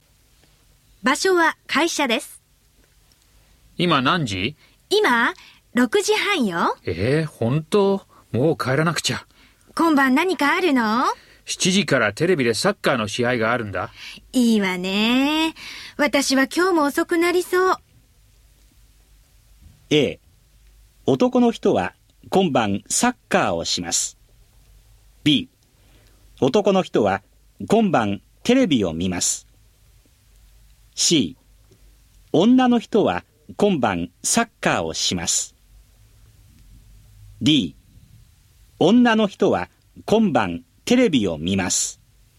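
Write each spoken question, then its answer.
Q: A 男の人は今晩サッカーをします。 B 男の人は今晩テレビを見ます。 C 女の人は今晩サッカーをします。 D 女の人は今晩テレビを見ます。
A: B: 男の人は今晩テレビを見ます。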